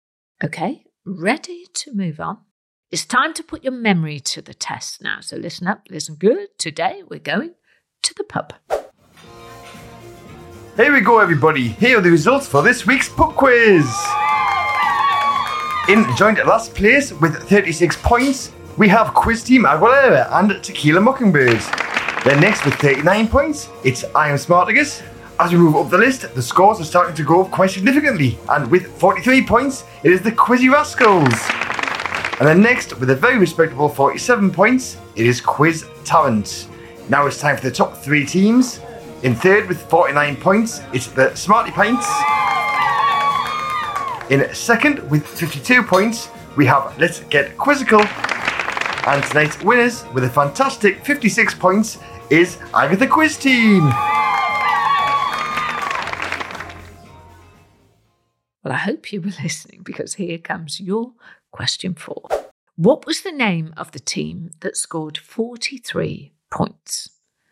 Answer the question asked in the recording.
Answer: Did you remember? The answer is Quizzy Rascals.